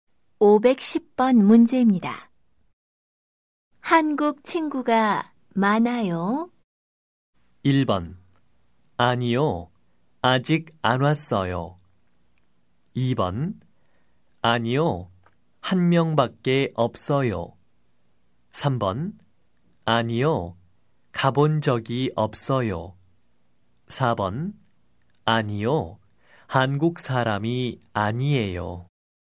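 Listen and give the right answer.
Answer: 2: 아니요. 한 명밖에 없어요.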